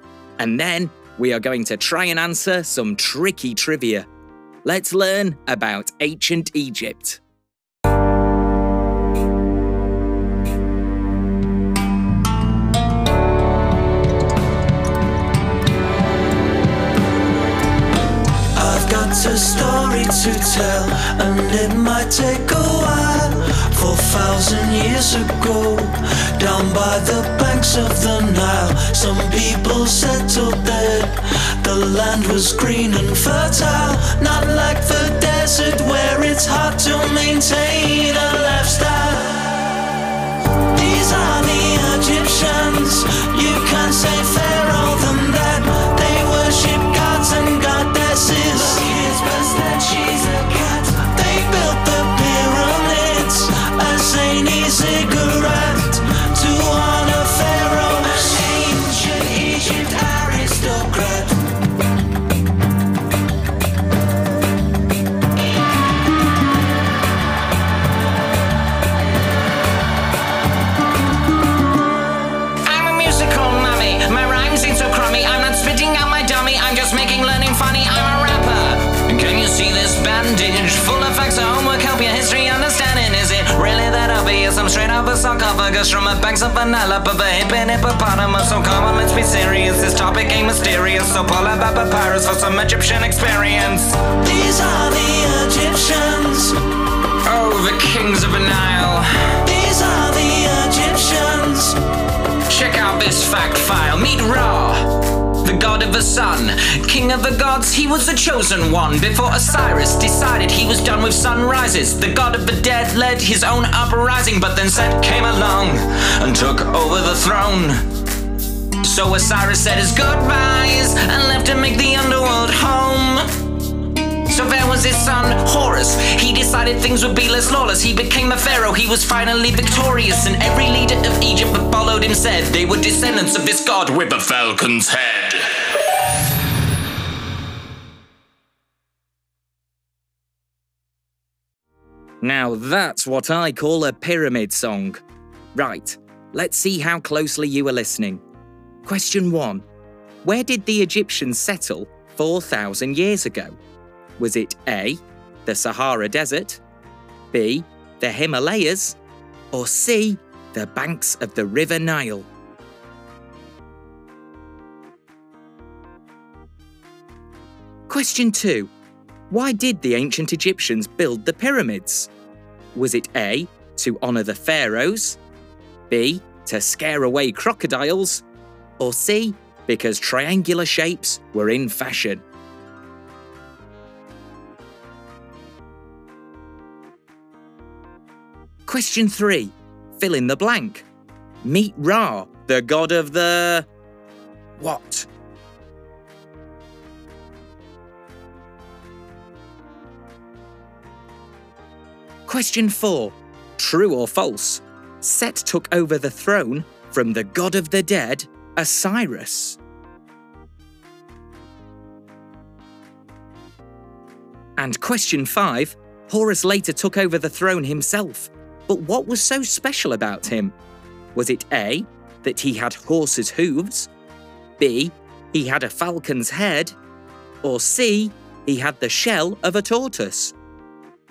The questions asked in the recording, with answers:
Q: Where did the Egyptians settle 4,000 years ago?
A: the answer is C, the banks of the River Nile.

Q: Fill in the blank. Meet Ra, the god of the... what?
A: Meet Ra, the god of the sun.

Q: True or false? Set took over the throne from the god of the dead, Osiris.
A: The answer is true.

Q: Horus later took over the throne himself. But what was so special about him?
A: the answer is actually B.